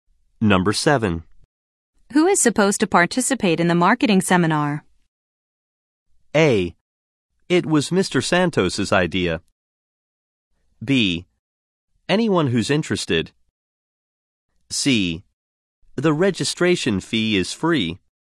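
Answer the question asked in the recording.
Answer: B: Anyone who's interested.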